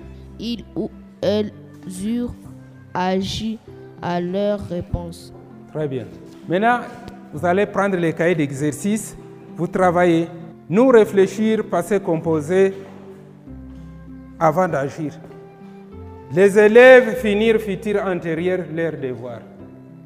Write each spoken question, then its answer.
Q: Nous réfléchir, passé composé, avant d'agir.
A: Nous avons réfléchi.

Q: Les élèves finir futur antérieur leur devoir.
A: Les élèves auront fini leur devoir.